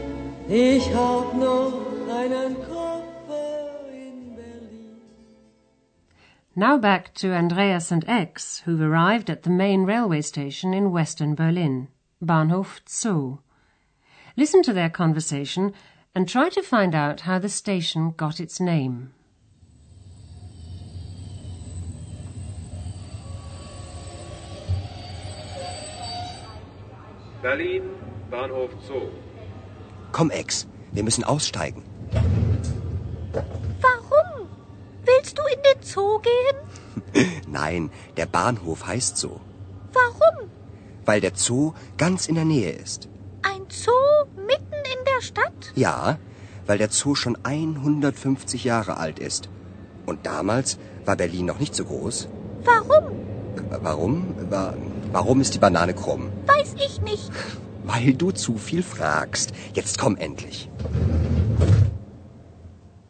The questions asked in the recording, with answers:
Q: Listen to their conversation and try to find out how the station got its name.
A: The station is called Bahnhof Zoo because it's located near the Berlin Zoo.